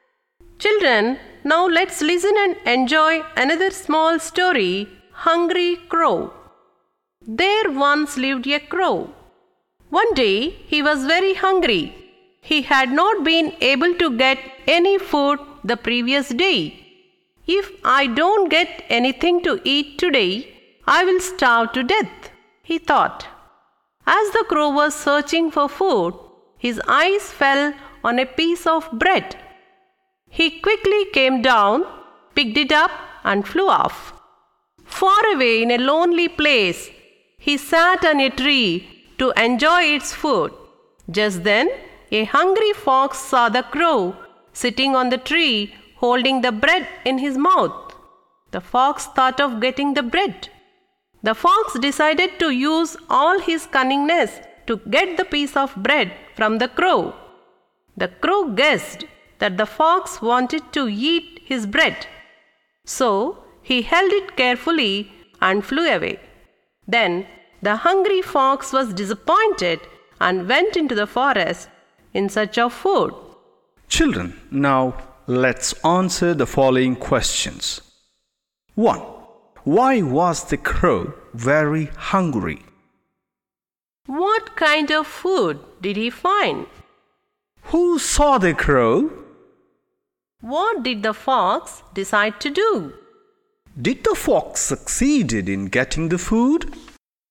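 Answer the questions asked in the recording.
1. He had not been able to get any food the previous day.
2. A piece of bread
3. A hungry fox
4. Use all his cunningness to get the bread from the crow.
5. No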